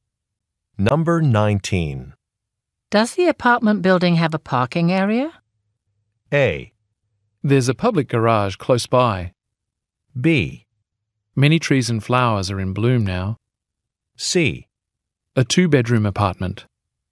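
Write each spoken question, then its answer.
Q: Does the apartment building have a parking area?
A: A: There's a public garage close by.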